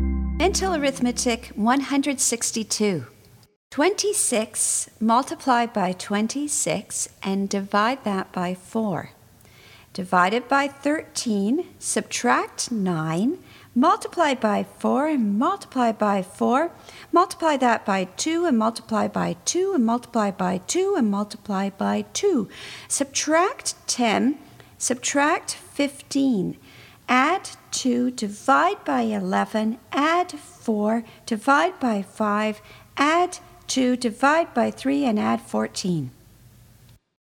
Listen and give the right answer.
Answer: And the answer is 21.